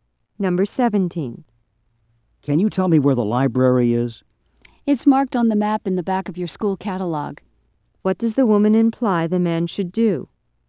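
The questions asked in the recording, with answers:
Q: What does the woman imply the man should do?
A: Look at the map in the back of his school catalog.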